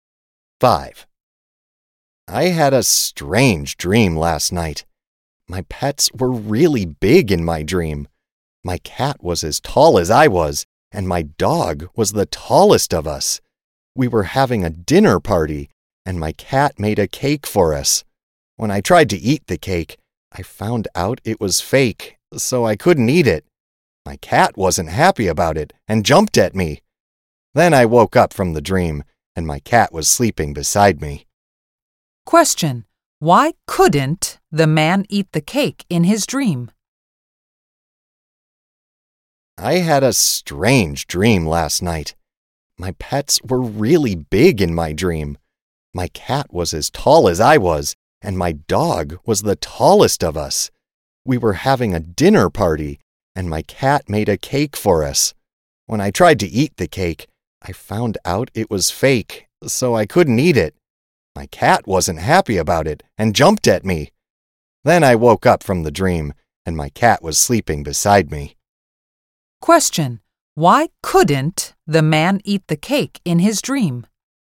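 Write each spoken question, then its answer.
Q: why couldn't the man eat the cake in his dream?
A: Because the cake was fake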